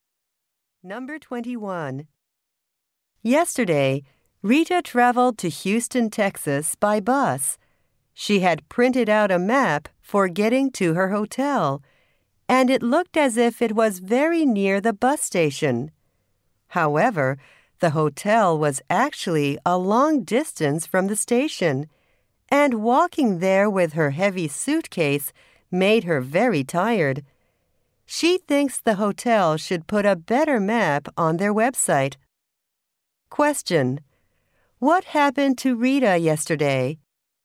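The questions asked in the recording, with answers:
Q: Question: What happened to Rita yesterday?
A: She got very tired walking a long way to her hotel.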